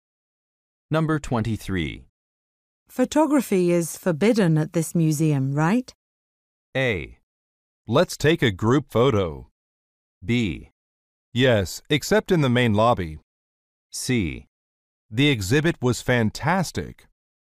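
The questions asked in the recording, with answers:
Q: Photography is forbidden at this museum, right?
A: B: Yes, except in the main lobby.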